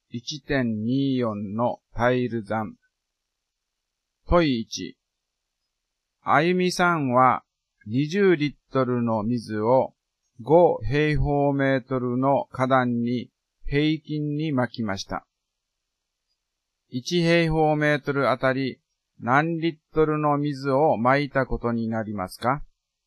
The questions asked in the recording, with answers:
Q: 1平方メートルあたり何リットルの水を撒いたことになりますか?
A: 式は 20÷5 で1平方メートルあたり4リットルになりますね